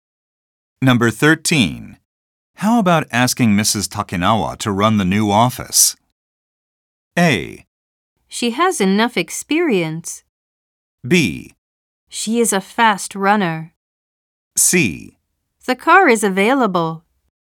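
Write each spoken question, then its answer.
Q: How about asking Mrs. Takinawa to run the new office?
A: A: She has enough experience.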